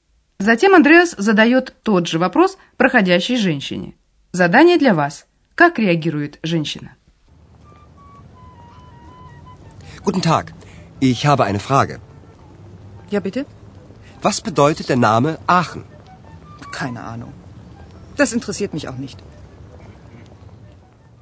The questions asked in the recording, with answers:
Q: Как реагирует женщина?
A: Женщина ответила, что понятия не имеет.